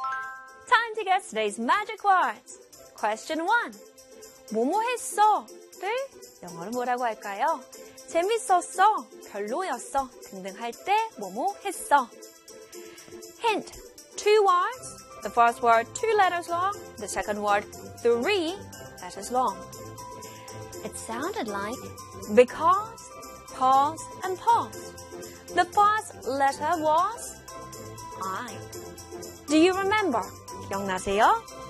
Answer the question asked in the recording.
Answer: It was. It was. It was great.